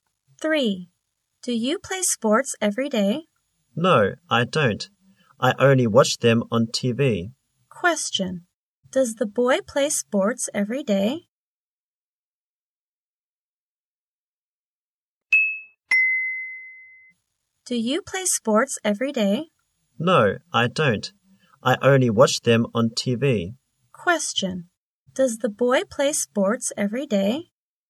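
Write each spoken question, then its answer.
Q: Does the boy play sports every day?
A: No, he doesn't.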